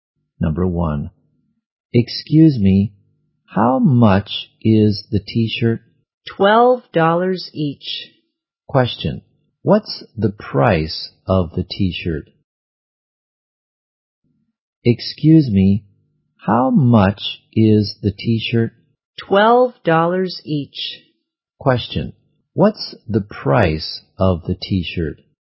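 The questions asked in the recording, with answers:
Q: Question, what's the price of the t-shirt?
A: $12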